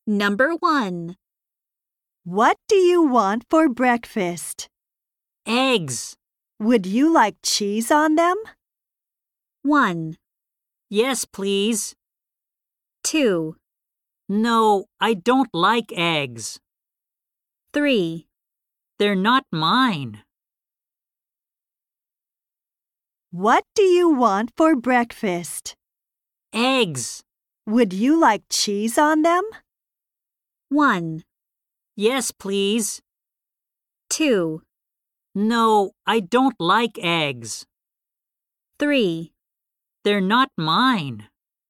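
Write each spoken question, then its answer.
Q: Would you like cheese on them?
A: 1: Yes, please.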